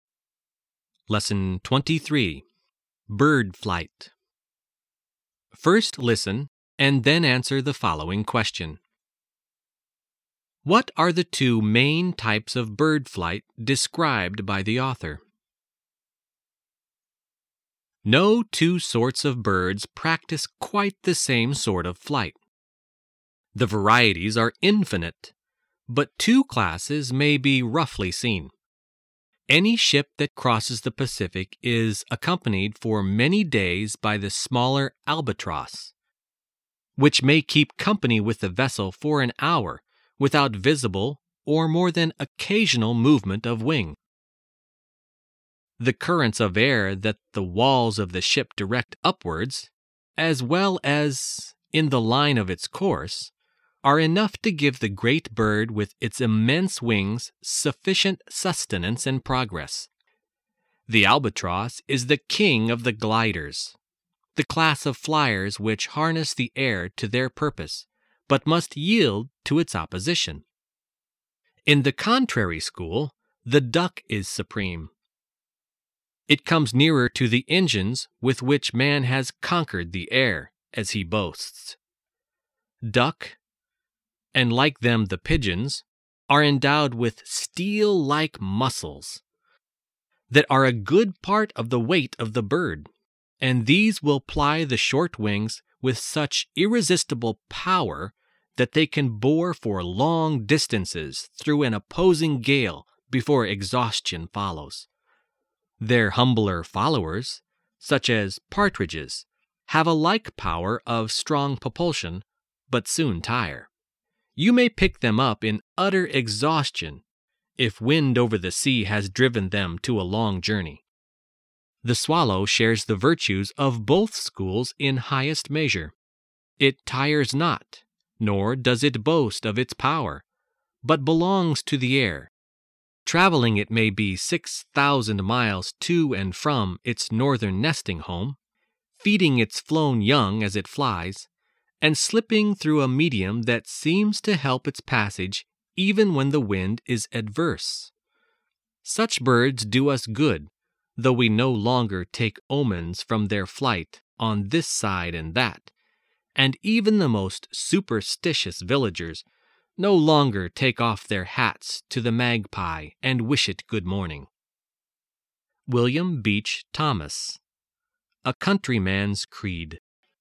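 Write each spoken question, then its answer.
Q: What are the two main types of bird flight described by the author?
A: Gliding (like the albatross, using air currents) and powered flapping flight (like the duck, with strong muscles driving short wings)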